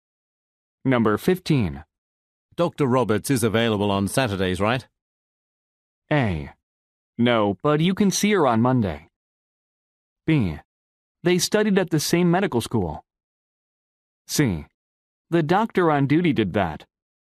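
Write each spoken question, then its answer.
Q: Dr. Roberts is available on Saturdays, right?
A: A: No, but you can see her on Monday.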